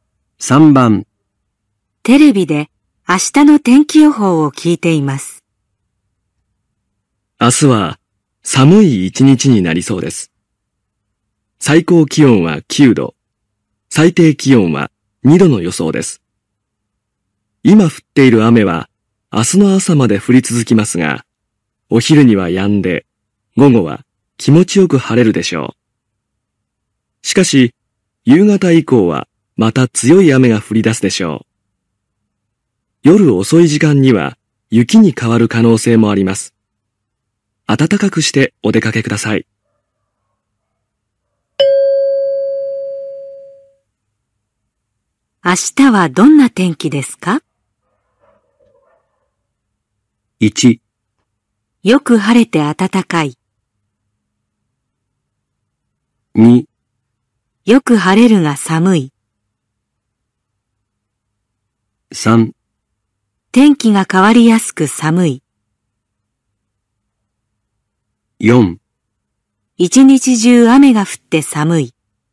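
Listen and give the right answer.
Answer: 3: 天気が変わりやすく寒い。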